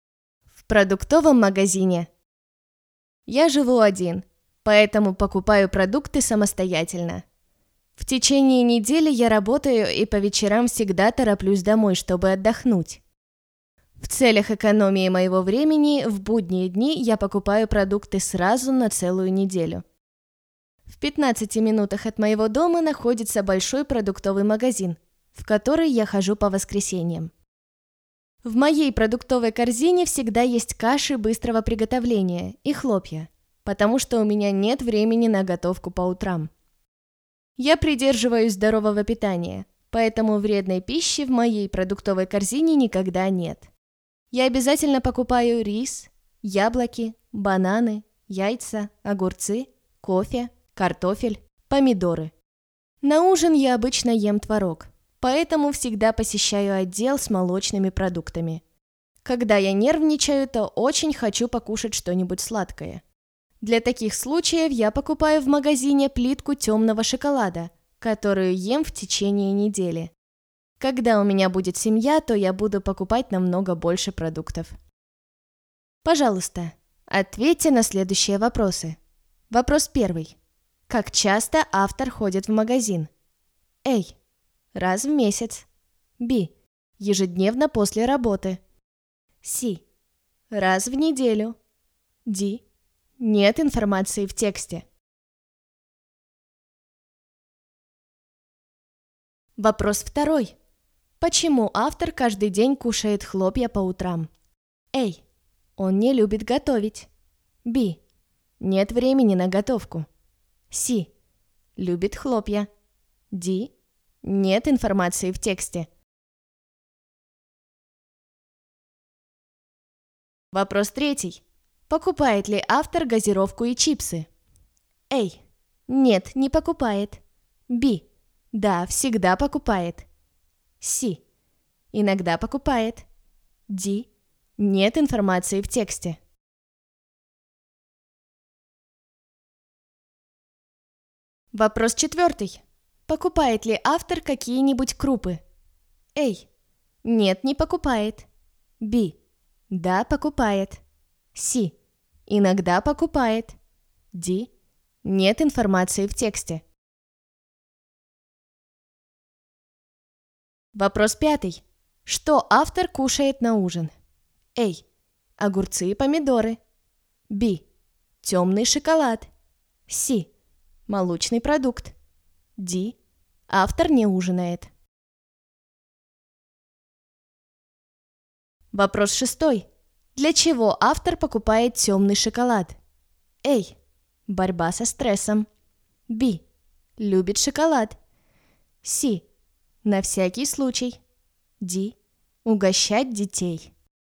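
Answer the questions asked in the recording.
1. С: Раз в неделю.
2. Б: Нет времени на готовку.
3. А: Нет, не покупает.
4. Б: Да, покупает.
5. С: Молочный продукт.
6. А: Борьба со стрессом.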